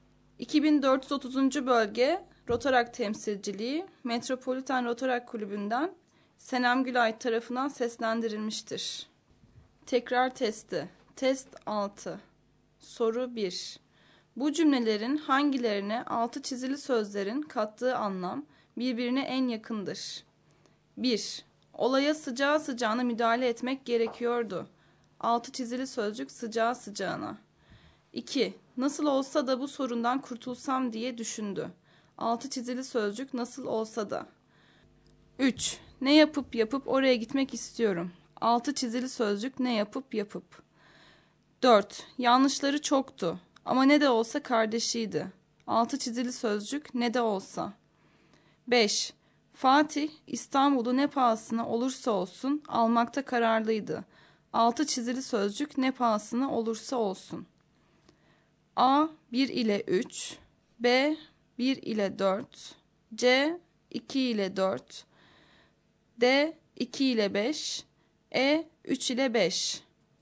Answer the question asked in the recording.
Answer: Doğru yanıt E şıkkı.